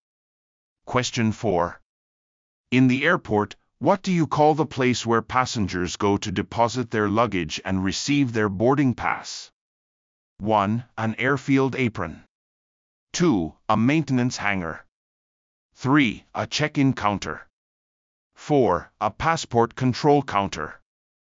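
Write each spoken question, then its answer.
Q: In the airport, what do you call the place where passengers go to deposit their luggage and receive their boarding pass?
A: 3: A check-in counter.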